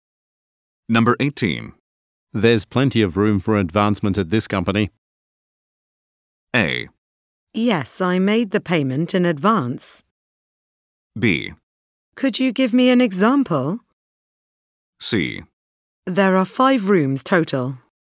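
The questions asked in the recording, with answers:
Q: There's plenty of room for advancement at this company.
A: B: Could you give me an example?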